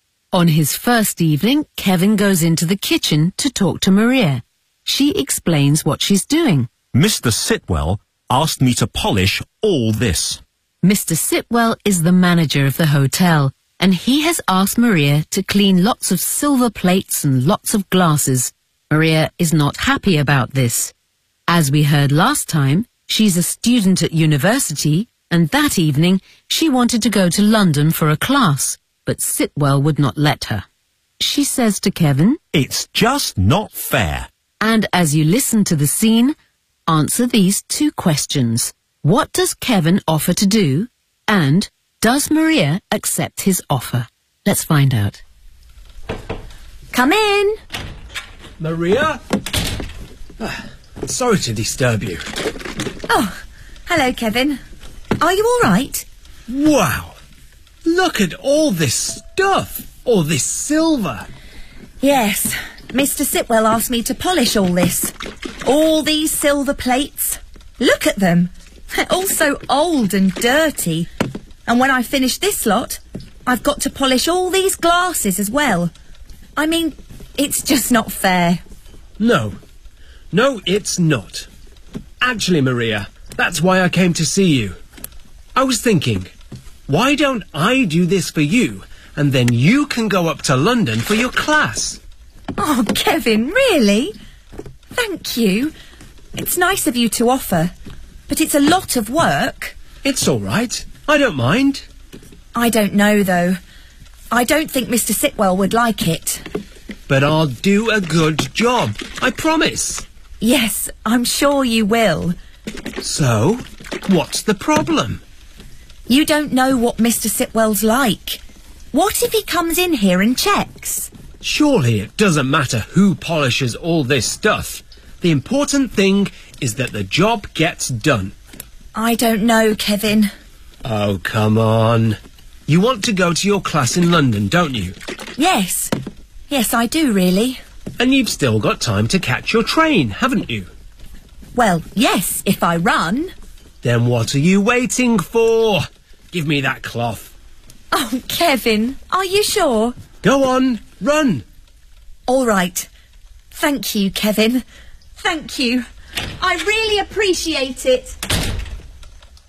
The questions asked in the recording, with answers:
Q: What does Kevin offer to do?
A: Why don't I do this for you?

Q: And does Maria accept his offer?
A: And so Maria goes off to London and leaves Kevin alone in the kitchen polishing the silver plates and the glasses.